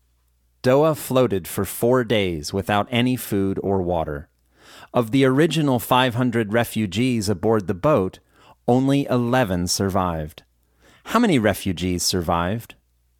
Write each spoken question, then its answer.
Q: How many refugees survived?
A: Only 11 refugees survived.